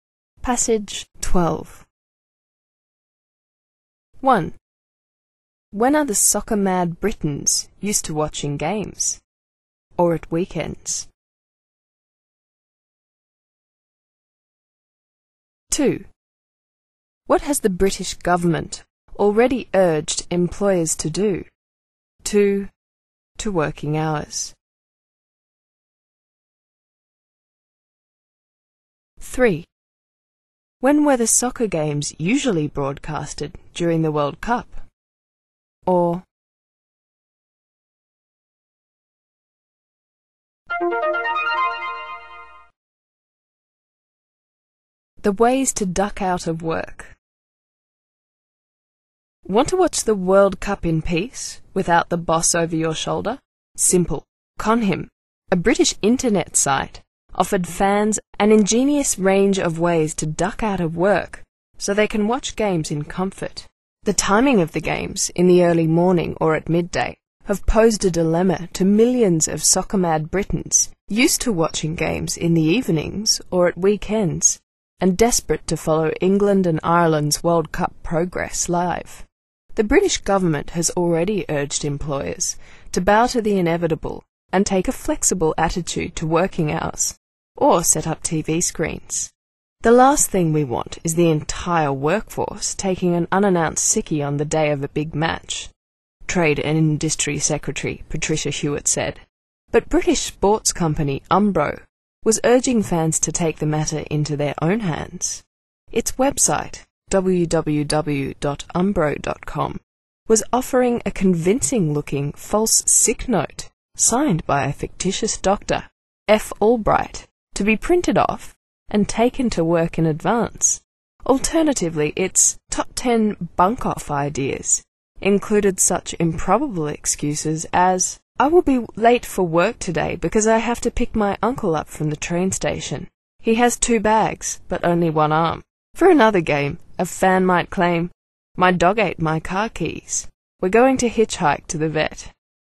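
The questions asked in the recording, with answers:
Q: When are the soccer-mad Britons used to watching games?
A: In the evenings or at weekends

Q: What has the British government already urged employers to do?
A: To take a flexible attitude to working hours, or set up TV screens

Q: When were the soccer games usually broadcasted during the World Cup?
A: In the early morning or at midday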